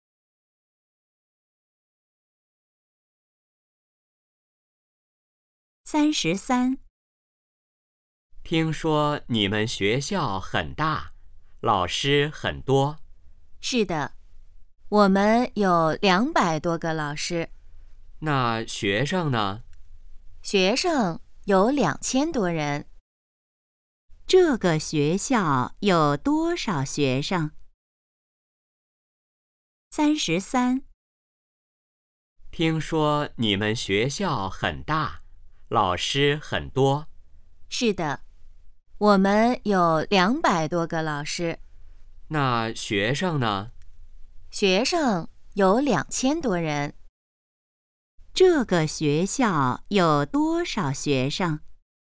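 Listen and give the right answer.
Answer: 2000多人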